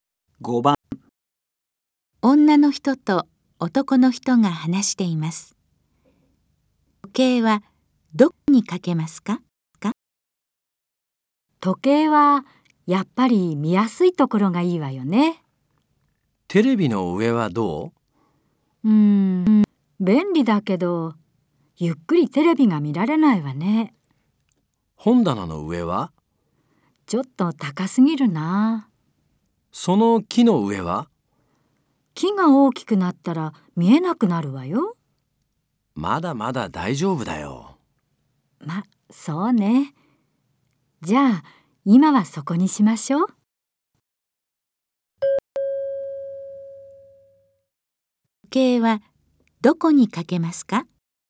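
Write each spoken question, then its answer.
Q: 時計はどこにかけますか?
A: 木の上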